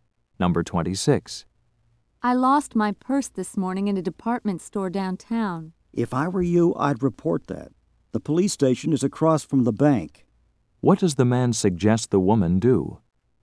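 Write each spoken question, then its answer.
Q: What does the man suggest the woman do?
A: Report the lost purse to the police.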